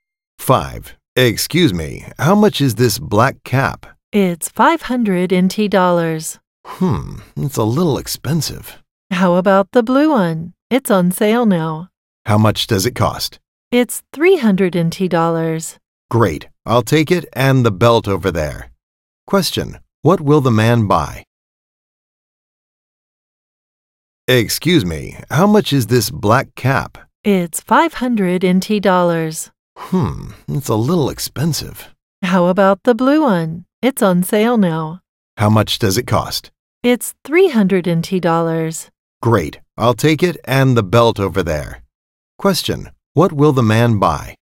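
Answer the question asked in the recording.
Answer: The blue cap and the belt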